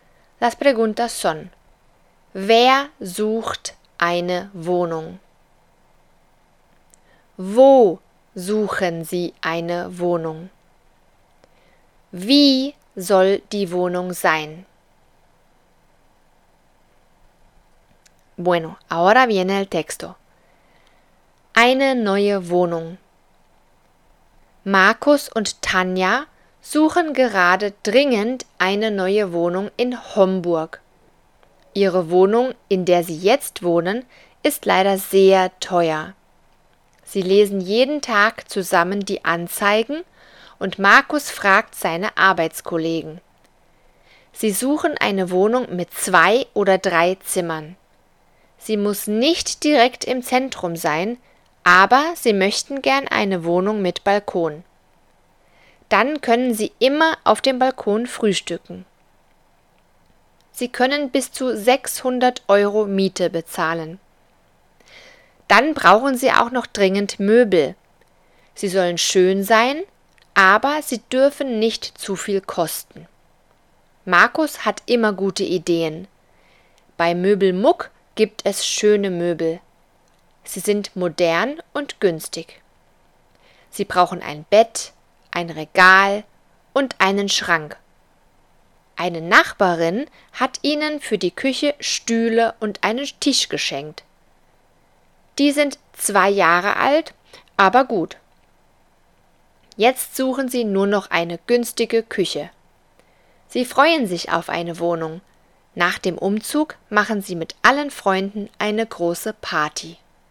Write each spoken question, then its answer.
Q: Wer sucht eine Wohnung?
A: Tanja und Markus.

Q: Wo suchen Sie eine Wohnung.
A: in Homburg.

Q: Wie soll die Wohnung sein?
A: Zwei bis drei Zimmer mit Balkon bis 600 Euro Miete.